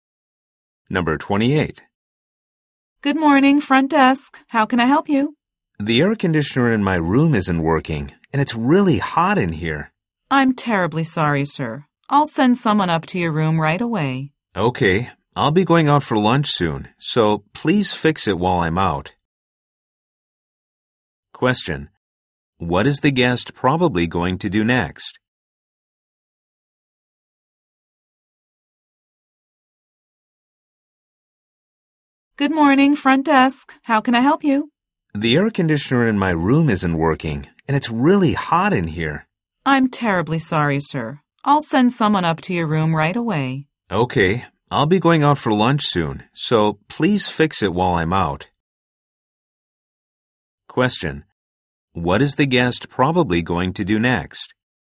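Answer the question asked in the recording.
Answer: Go out for lunch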